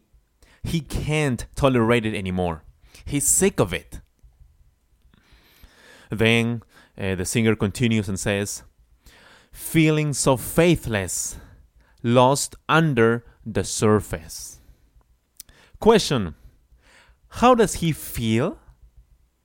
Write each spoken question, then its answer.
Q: how does he feel?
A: Yes, he feels so faithless.